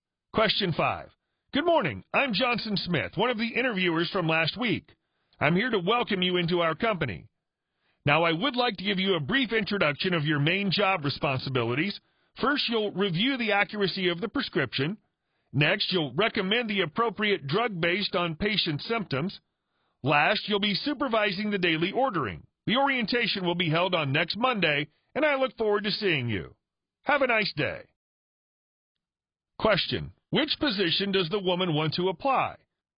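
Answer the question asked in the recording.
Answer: Pharmacist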